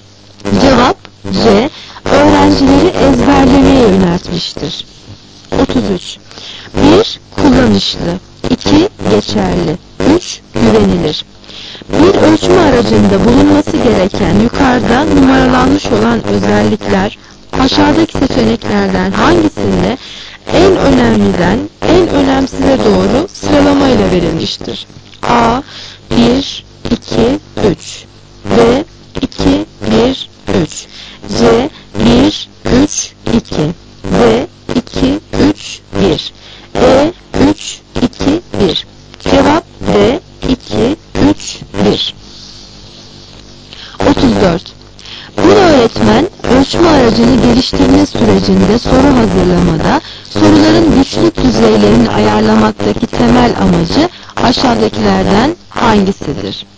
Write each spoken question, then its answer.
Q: Bir ölçme aracında bulunması gereken yukarıda numaralanmış olan özellikler aşağıdaki seçeneklerden hangisinde en önemliden en önemsize doğru sıralamayla verilmiştir?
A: Cevap D 2 3 1